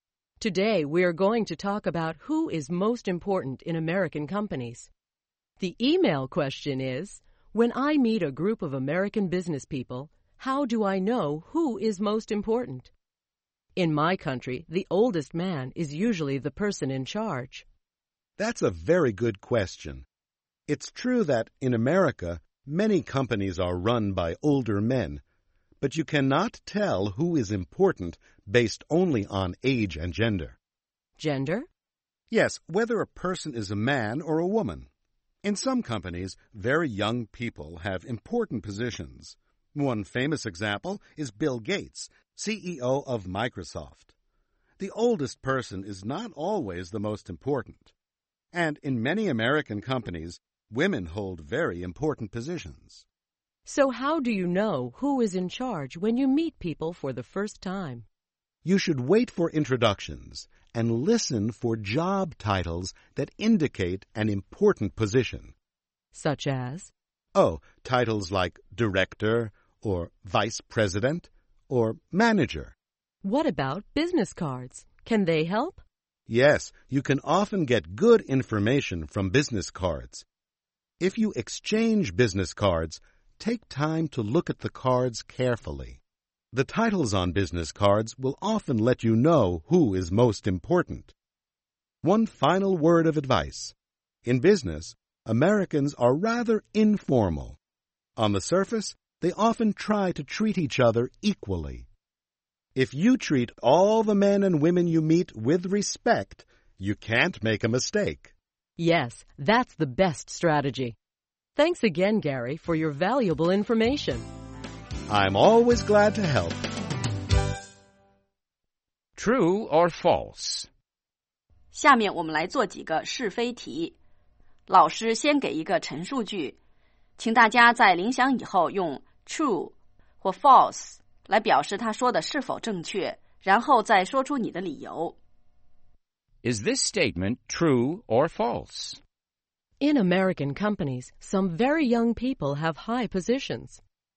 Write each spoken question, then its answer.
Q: In American companies, some very young people have high positions.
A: True. Young people sometimes have high positions in American companies.